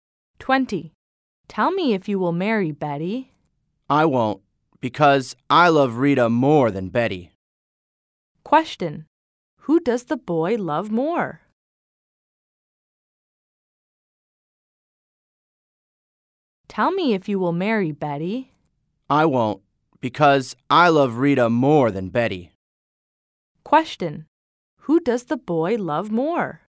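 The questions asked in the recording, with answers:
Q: Who does the boy love more?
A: Rita.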